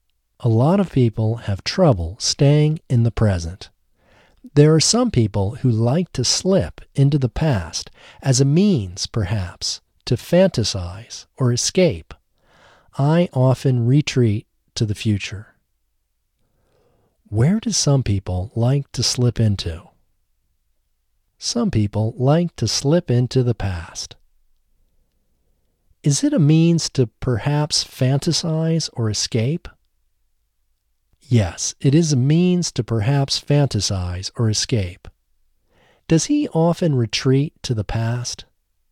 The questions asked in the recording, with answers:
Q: Where do some people like to slip into?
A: Some people like to slip into the past.

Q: Does he often retreat to the past?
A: No, he doesn't often retreat to the past.